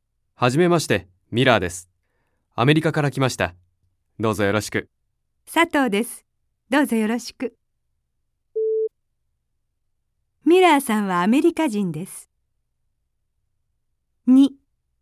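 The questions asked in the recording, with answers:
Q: ミラーさんはアメリカ人です。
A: ○(正しい)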